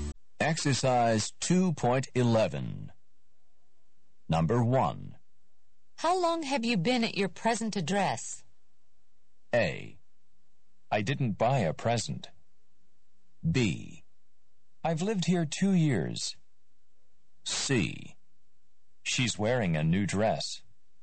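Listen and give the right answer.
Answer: B: I've lived here 2 years.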